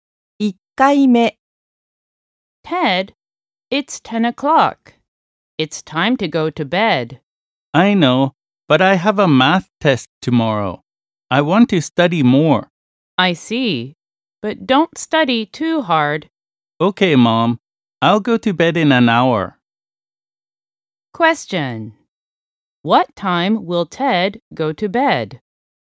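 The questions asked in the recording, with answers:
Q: What time will Ted go to bed?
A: At 11 o'clock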